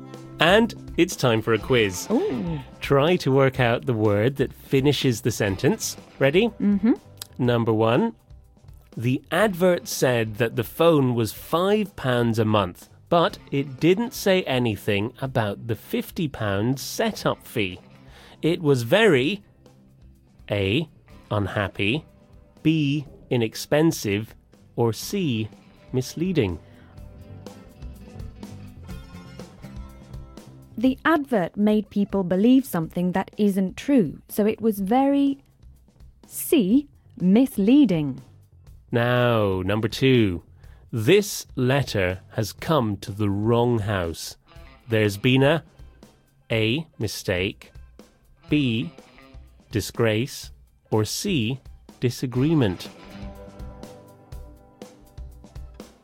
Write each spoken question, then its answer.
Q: The advert said that the phone was £5 a month, but it didn't say anything about the £50 setup fee. It was very A. unhappy, B. inexpensive, or C. misleading.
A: The advert made people believe something that isn't true, so it was very C. misleading.